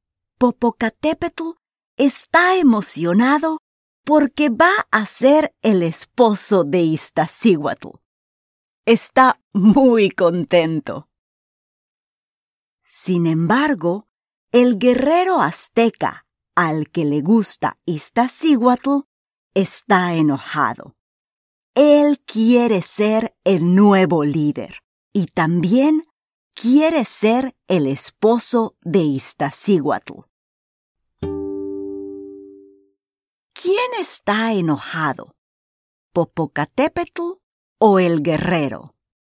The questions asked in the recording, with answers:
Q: ¿Quién está enojado? ¿Popocatépetl o el guerrero?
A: Sí, el guerrero.